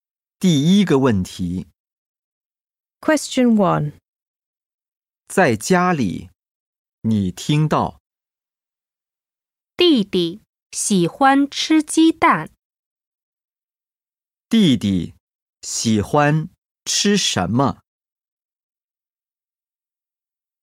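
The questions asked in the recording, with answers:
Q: 弟弟喜欢吃什么?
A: 鸡蛋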